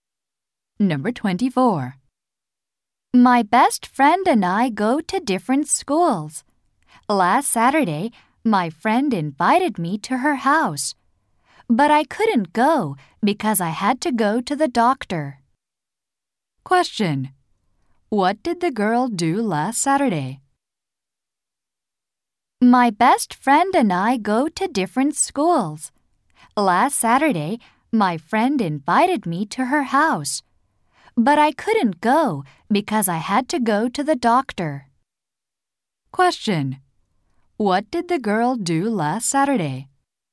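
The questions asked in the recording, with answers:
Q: What did the girl do last Saturday?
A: She went to the doctor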